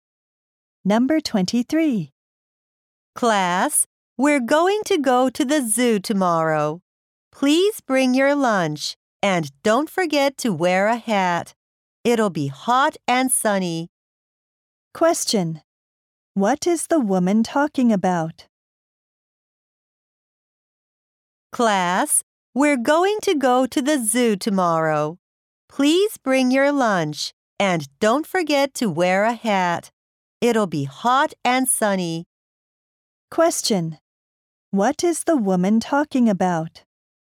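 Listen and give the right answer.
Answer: A class trip to the zoo tomorrow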